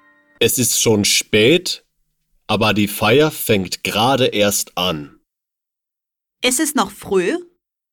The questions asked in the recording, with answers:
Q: Es ist noch früh?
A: Nein, es ist nicht mehr früh.